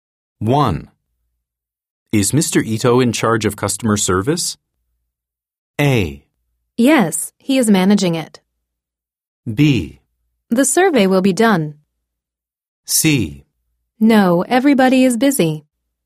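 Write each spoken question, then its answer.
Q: Is Mr. Ito in charge of customer service?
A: A: Yes, he is managing it.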